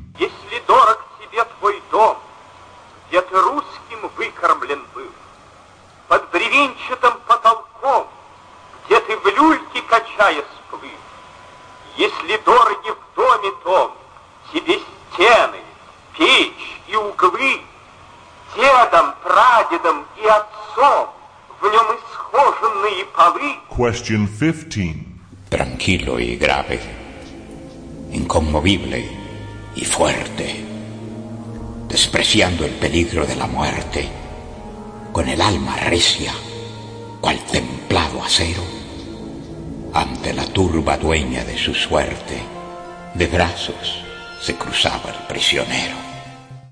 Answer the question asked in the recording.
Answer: And number 15, Spanish.